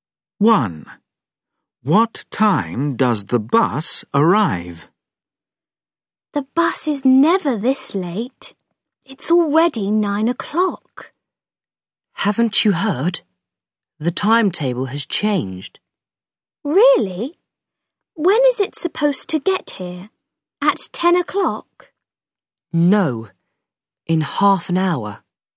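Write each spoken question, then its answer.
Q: What time does the bus arrive?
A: 9:30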